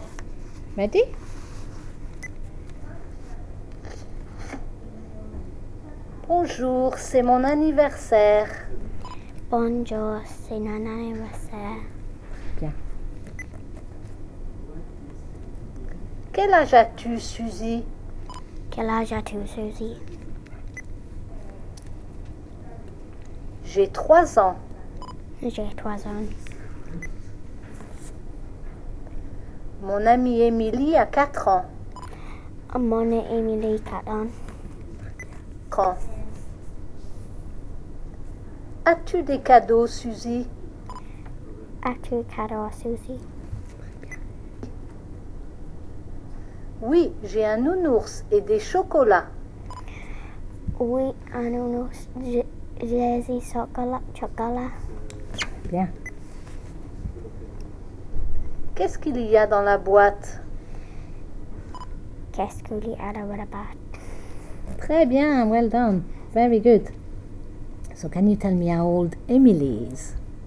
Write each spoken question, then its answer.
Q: So can you tell me how old Emily is?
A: Mon amie Emily a 4 ans.